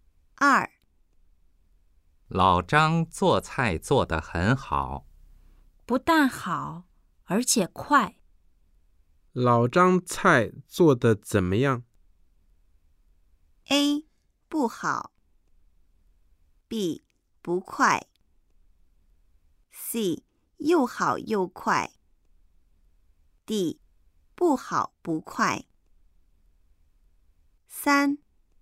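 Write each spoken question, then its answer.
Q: 老张菜做得怎么样?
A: C: 又好又快。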